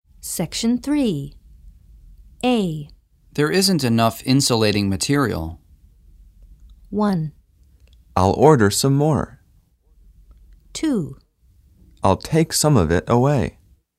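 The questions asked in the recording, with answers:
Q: There isn't enough insulating material.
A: 1: I'll order some more.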